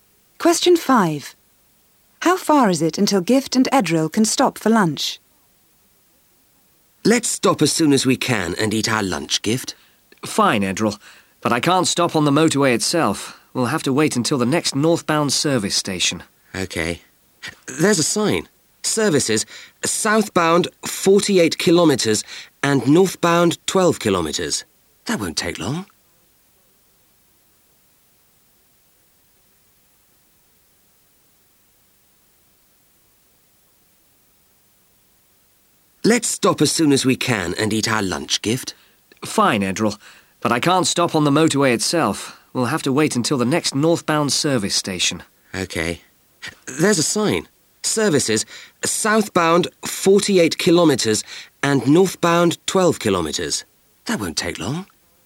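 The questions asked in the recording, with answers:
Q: How far is it until Gift and Edril can stop for lunch?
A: 12 kilometres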